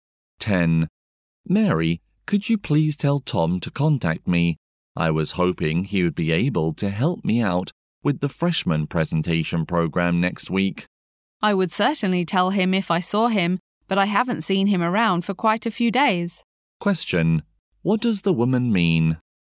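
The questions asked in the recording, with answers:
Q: what does the woman mean?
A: She hasn't seen Tom for days but will tell him if she sees him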